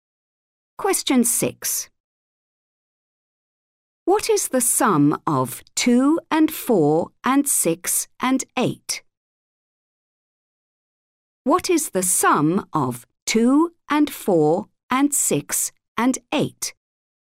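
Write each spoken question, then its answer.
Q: What is the sum of 2 and 4 and 6 and 8?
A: 20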